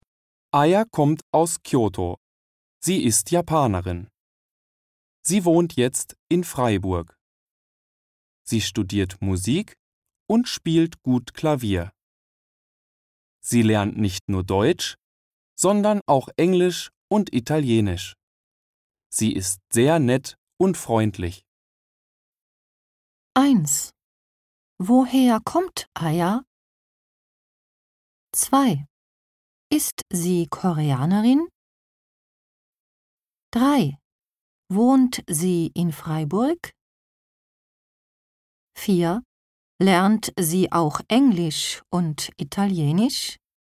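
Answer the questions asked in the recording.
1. Aus Kyoto.
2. Nein, sie ist Japanerin.
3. Ja.
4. Ja.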